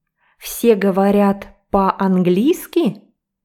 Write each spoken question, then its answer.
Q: Все говорят по-английски?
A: Нет, все говорят по-русски, на русском языке.